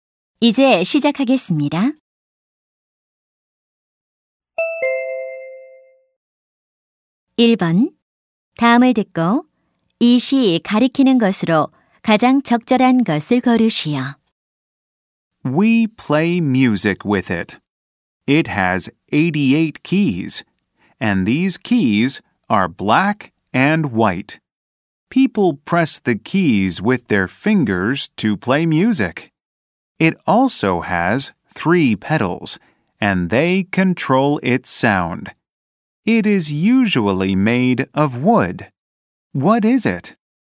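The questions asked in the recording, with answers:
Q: 다음을 듣고 이 시 가리키는 것으로 가장 적절한 것을 고르시오.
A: 피아노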